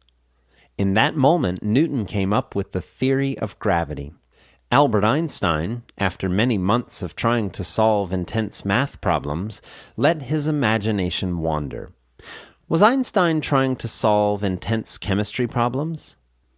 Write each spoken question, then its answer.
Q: Was Einstein trying to solve intense chemistry problems?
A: No, he was trying to solve intense math problems.